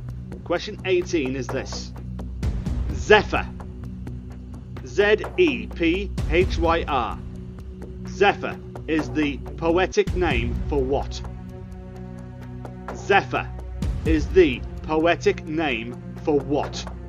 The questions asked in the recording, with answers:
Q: Zephyr is the poetic name for what?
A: Zephyr is a west wind. That is the right answer.